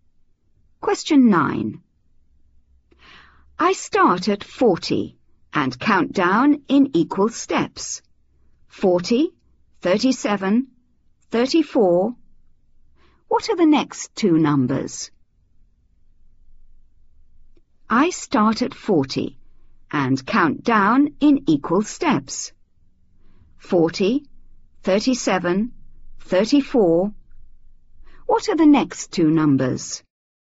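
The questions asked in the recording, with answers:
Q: 40, 37, 34. What are the next two numbers?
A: 31, 28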